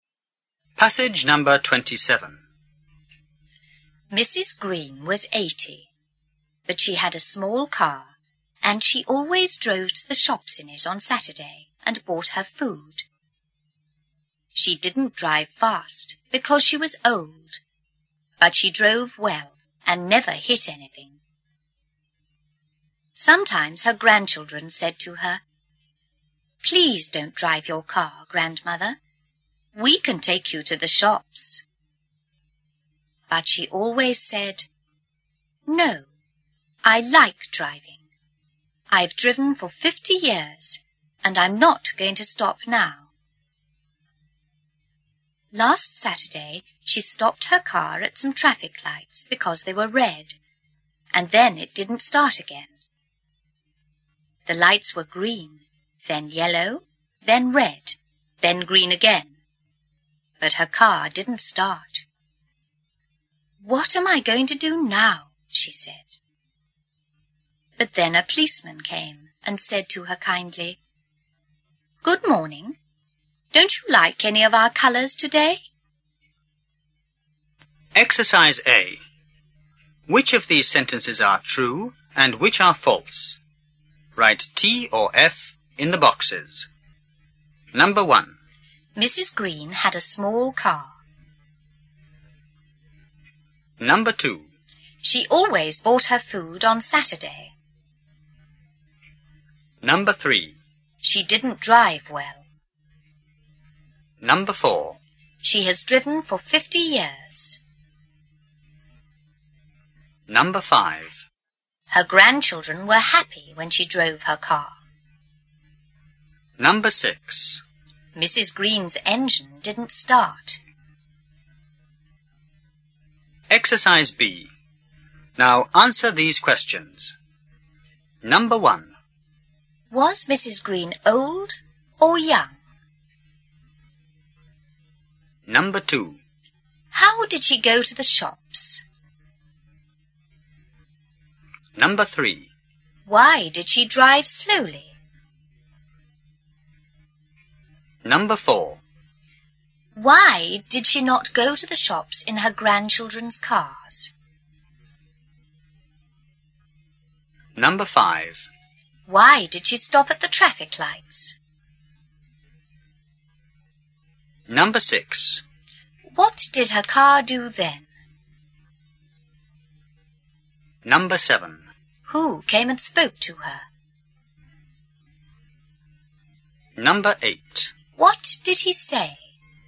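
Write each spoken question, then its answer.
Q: Mrs. Green had a small car.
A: True

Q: She always bought her food on Saturday.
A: True

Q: She didn't drive well.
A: False

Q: She has driven for 50 years.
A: True

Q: Her grandchildren were happy when she drove her car.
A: False

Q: Mrs. Green's engine didn't start.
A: True

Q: Was Mrs. Green old or young?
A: She was old.

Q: How did she go to the shops?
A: She drove her small car.

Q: Why did she drive slowly?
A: Because she was old.

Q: Why did she not go to the shops in her grandchildren's cars?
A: Because she liked driving.

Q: Why did she stop at the traffic lights?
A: Because they were red.

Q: What did her car do then?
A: It didn't start again.

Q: Who came and spoke to her?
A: A policeman.

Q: What did he say?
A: Good morning. Don't you like any of our colours today?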